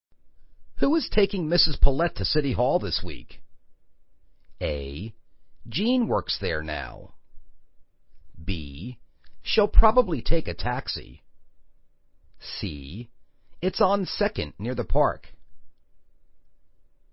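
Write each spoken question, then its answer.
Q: Who is taking Mrs. Paulette to City Hall this week?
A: B: She'll probably take a taxi.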